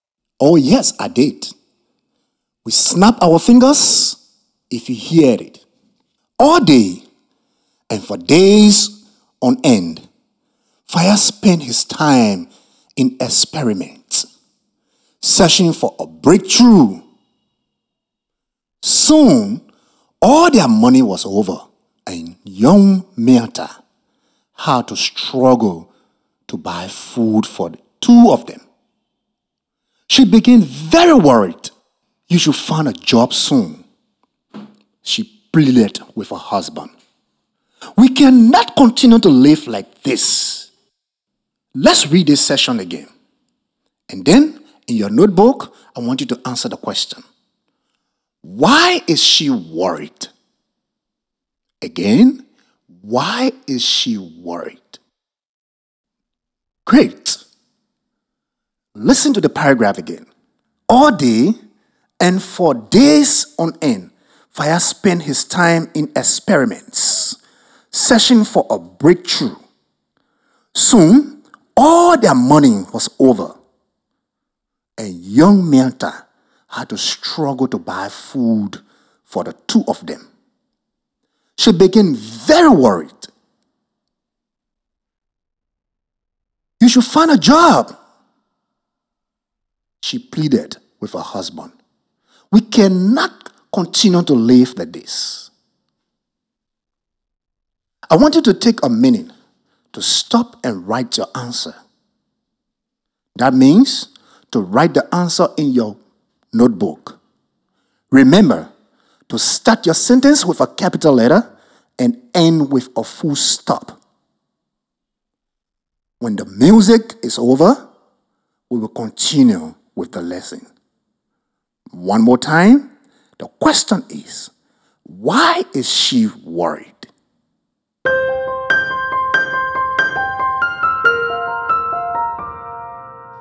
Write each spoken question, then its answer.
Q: Why is she worried?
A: She was worried because they had no money and he had no job.